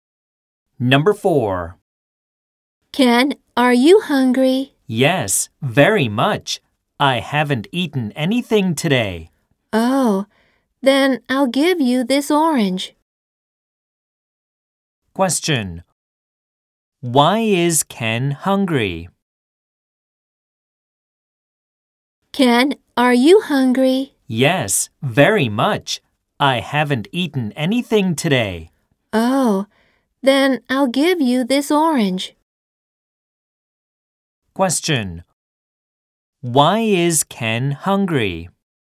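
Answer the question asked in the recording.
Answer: He hasn't eaten anything today.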